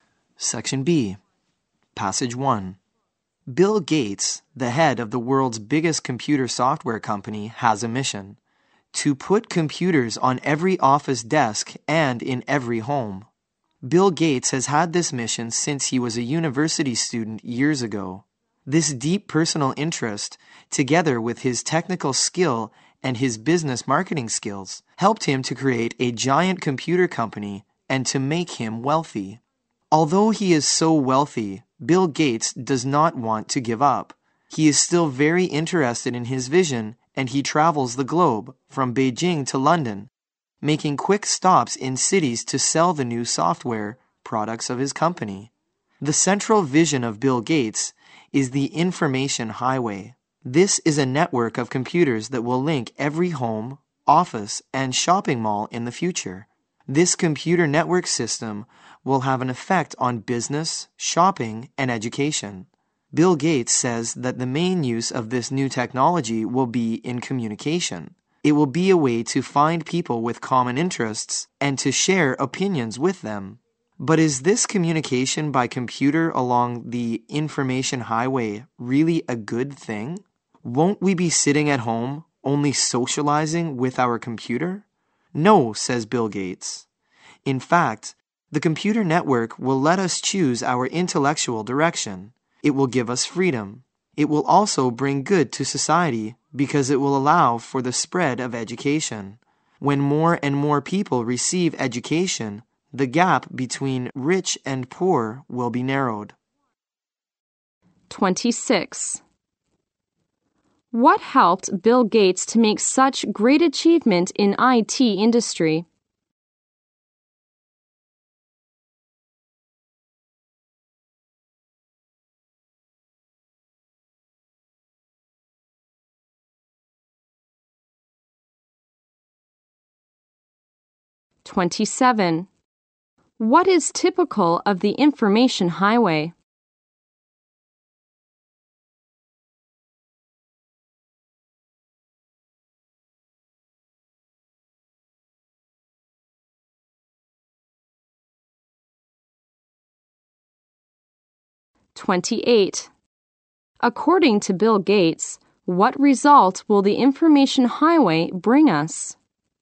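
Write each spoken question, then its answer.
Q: What helped Bill Gates to make such great achievement in IT industry?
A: His deep personal interest, technical skill and business marketing skills

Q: What is typical of the information highway?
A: It is a network of computers that will link every home, office and shopping mall.

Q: According to Bill Gates, what result will the information highway bring us?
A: It will spread education and narrow the gap between rich and poor.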